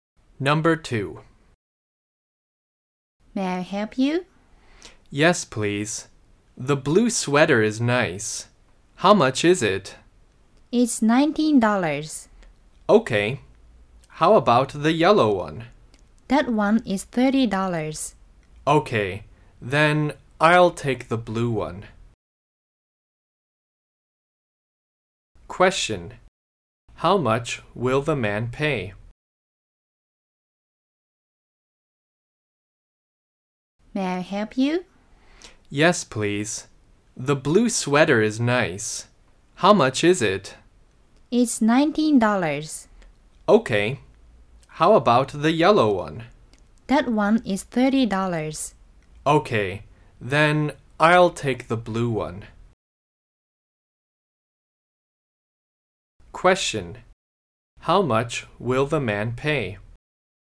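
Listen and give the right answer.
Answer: $19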